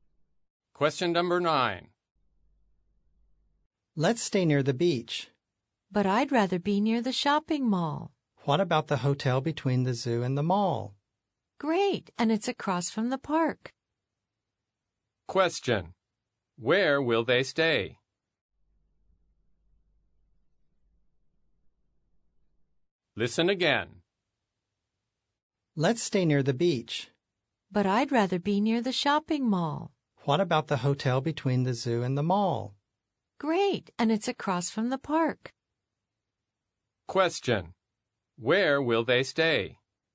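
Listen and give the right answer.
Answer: At the hotel between the zoo and the shopping mall, across from the park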